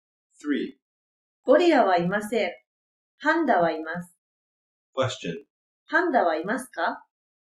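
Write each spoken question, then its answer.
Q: パンダはいますか?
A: はい、います。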